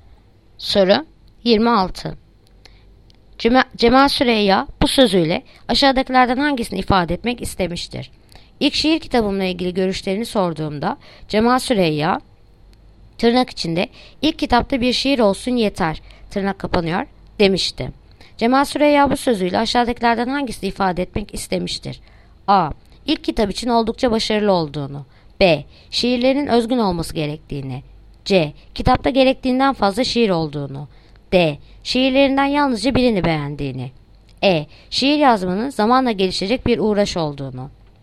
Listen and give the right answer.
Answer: Edirne. Şiir yazmanın zamanla gelişecek bir uğraş olduğunu.